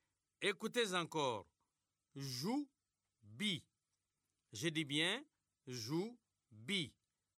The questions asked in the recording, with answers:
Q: Écoutez encore. Jou-bi. Je dis bien jou-bi.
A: C'est bijou.